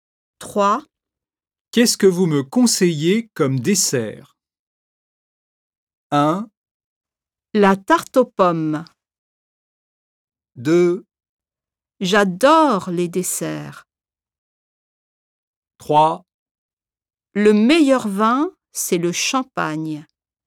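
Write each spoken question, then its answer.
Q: Qu'est-ce que vous me conseillez comme dessert?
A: 1: La tarte aux pommes.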